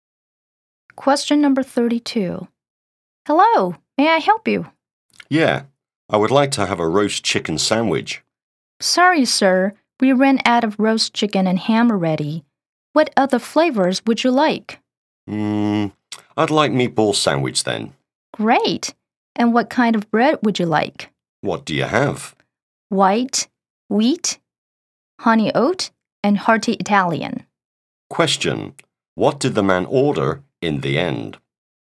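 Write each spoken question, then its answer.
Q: What did the man order in the end?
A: A meatball sandwich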